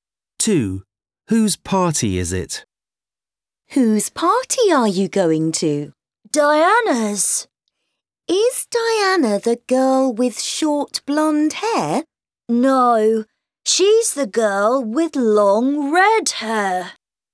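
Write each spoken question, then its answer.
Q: Whose party is it?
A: Diana's, the girl with long red hair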